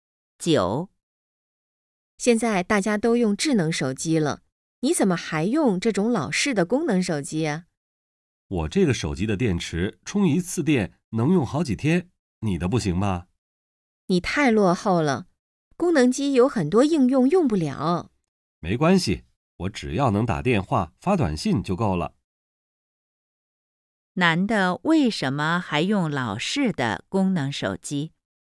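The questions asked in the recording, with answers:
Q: 男的为什么还用老式的功能手机?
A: 电池充一次能用好几天,只需打电话发短信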